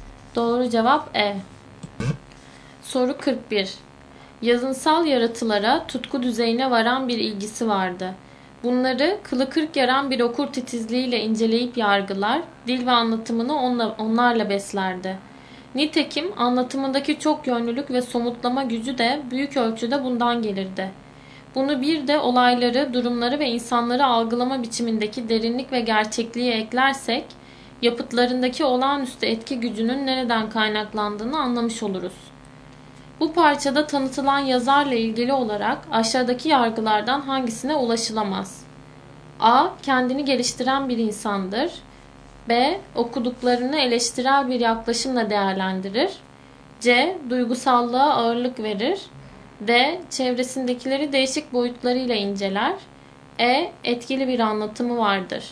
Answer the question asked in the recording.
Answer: Doğru cevap C.